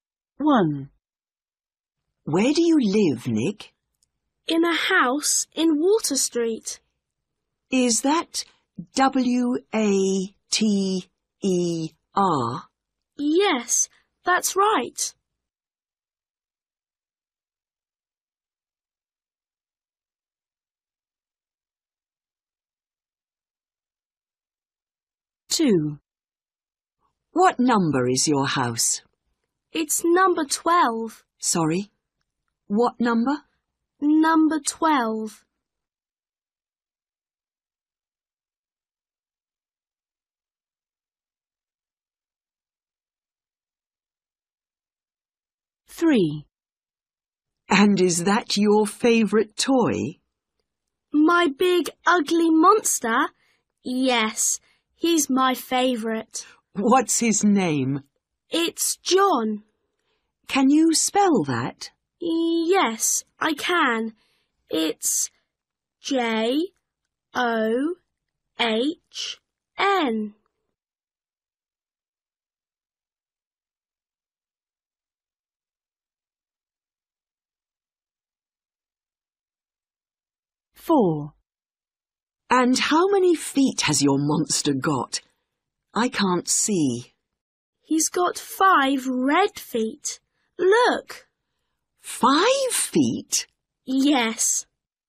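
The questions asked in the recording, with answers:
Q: Where do you live, Nick?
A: Water Street

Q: What number is your house?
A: 12

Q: What's his name?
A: John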